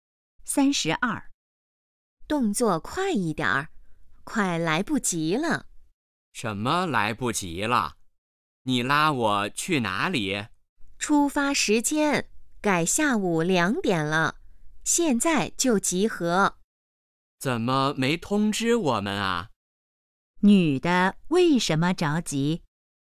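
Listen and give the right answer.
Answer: 出发时间提前到下午2点了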